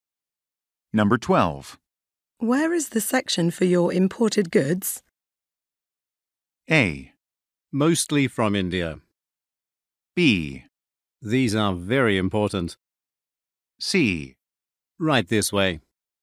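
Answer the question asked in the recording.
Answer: C: Right this way.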